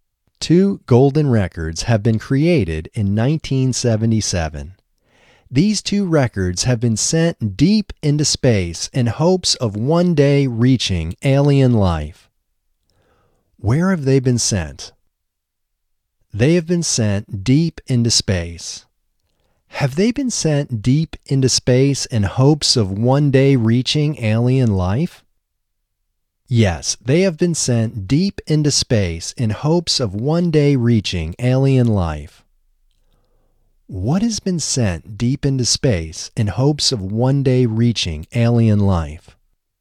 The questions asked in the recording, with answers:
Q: Where have they been sent?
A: They have been sent deep into space.

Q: Have they been sent deep into space in hopes of one day reaching alien life?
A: Yes, they have been sent deep into space in hopes of one day reaching alien life.

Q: What has been sent deep into space in hopes of one day reaching alien life?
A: Two records have been sent deep into space in hopes of one day reaching alien life.